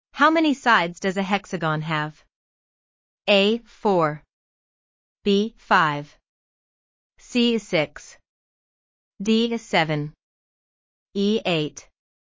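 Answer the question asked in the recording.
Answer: C: 6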